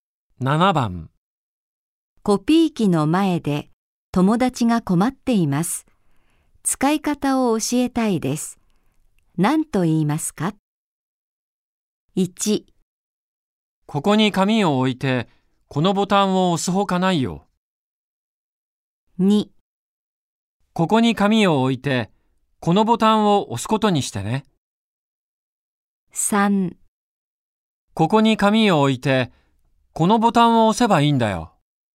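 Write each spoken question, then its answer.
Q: 何と言いますか?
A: 3: ここに紙を置いてこのボタンを押せばいいんだよ。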